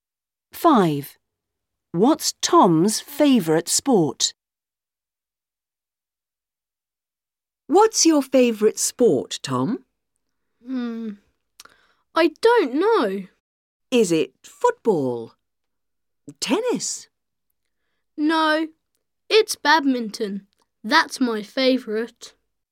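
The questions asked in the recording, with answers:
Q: What's Tom's favorite sport?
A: badminton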